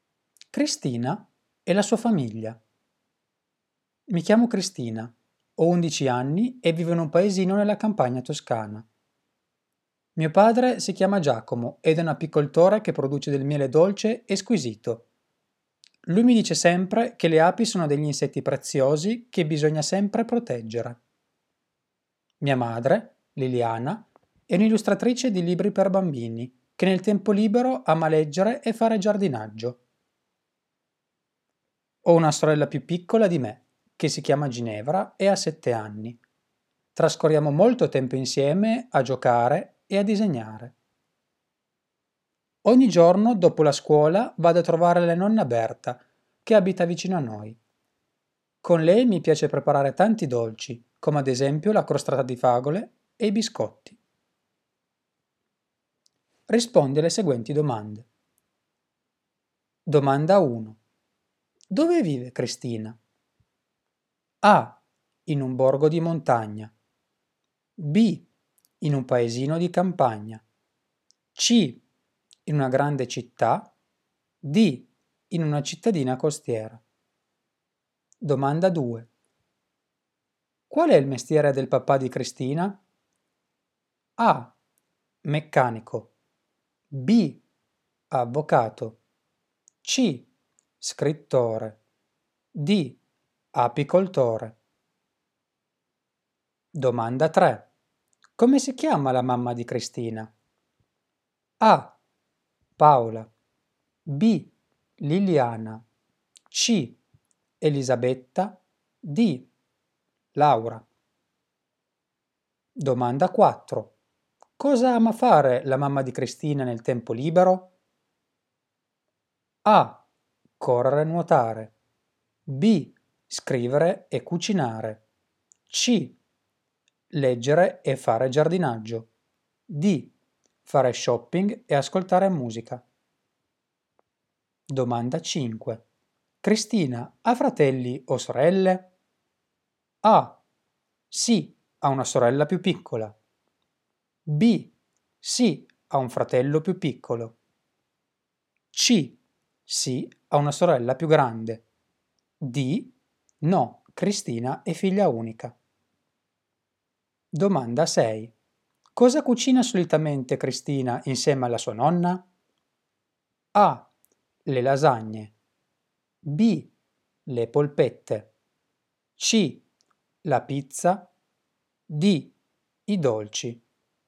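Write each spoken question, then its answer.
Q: Dove vive Cristina?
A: B: In un paesino di campagna.

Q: Qual è il mestiere del papà di Cristina?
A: D: Apicoltore.

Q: Come si chiama la mamma di Cristina?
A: B: Liliana.

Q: Cosa ama fare la mamma di Cristina nel tempo libero?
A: C: Leggere e fare giardinaggio.

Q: Cristina ha fratelli o sorelle?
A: A: Sì, ha una sorella più piccola.

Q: Cosa cucina solitamente Cristina insieme alla sua nonna?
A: D: I dolci.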